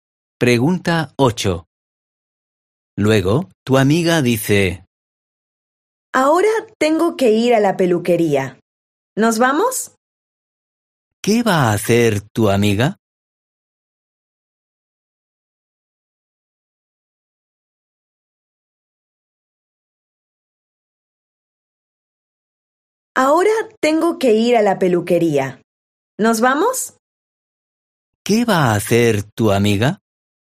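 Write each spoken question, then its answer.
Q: ¿Qué va a hacer tu amiga?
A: ir a la peluquería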